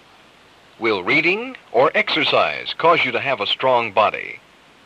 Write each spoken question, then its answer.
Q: Will reading or exercise cause you to have a strong body?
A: Exercise.